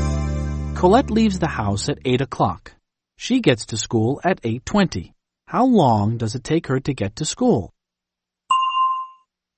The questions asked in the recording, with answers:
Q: How long does it take her to get to school?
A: It takes her 20 minutes. It takes her 20 minutes to get to school.